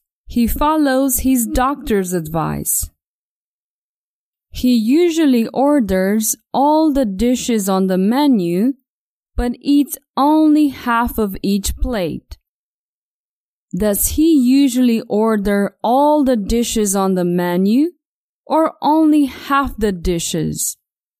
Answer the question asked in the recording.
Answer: Tom usually orders all the dishes on the menu, not only half the dishes.